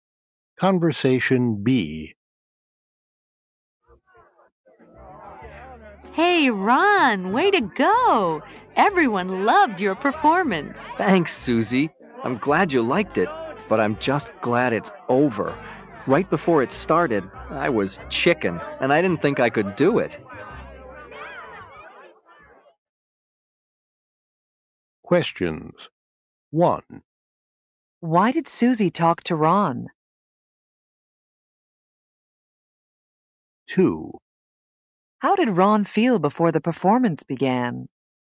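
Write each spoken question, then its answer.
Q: Why did Susie talk to Ron?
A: To congratulate him on his performance.

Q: How did Ron feel before the performance began?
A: He was scared (chicken).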